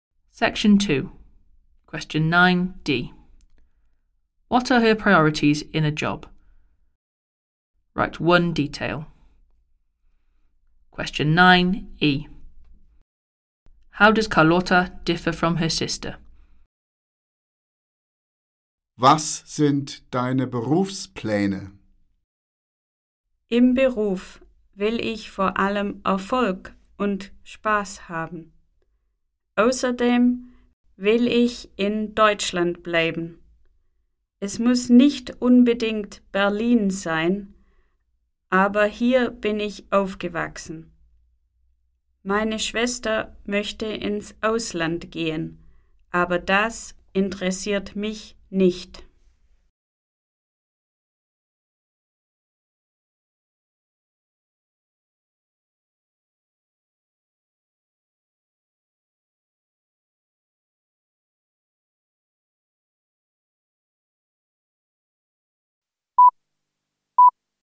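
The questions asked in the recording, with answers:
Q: What are her priorities in a job?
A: Success and fun

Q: How does Carlotta differ from her sister?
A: Her sister wants to go abroad; Carlotta wants to stay in Germany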